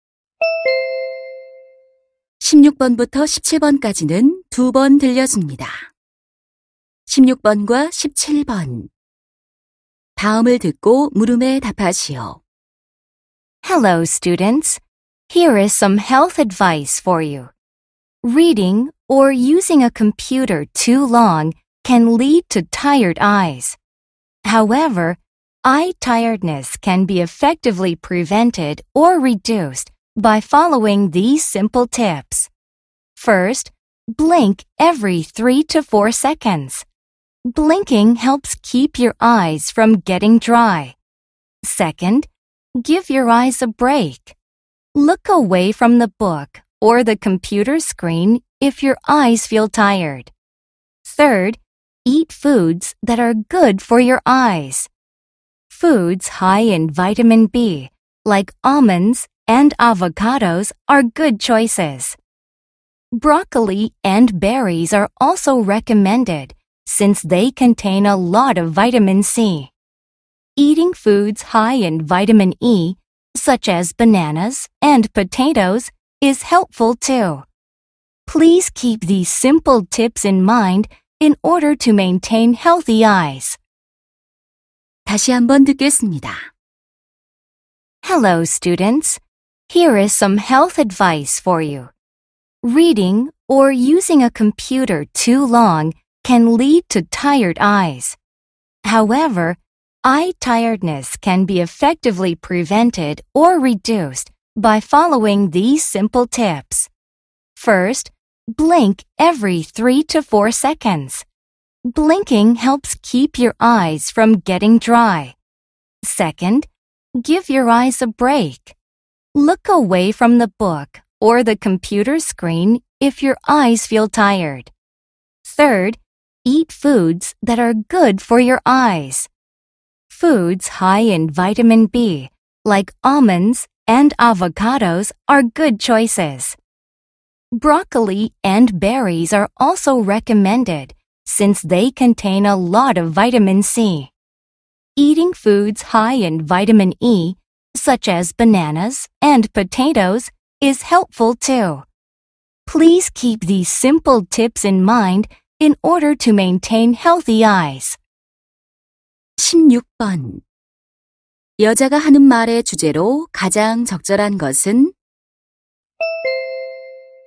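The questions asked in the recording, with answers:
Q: 여자가 하는 말의 주제로 가장 적절한 것은?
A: 눈의 피로를 예방하거나 줄이는 방법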